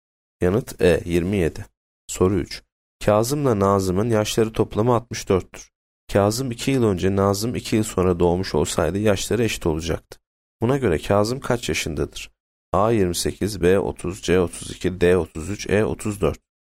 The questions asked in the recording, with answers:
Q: Buna göre Kazım kaç yaşındadır?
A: Yanıt B 30.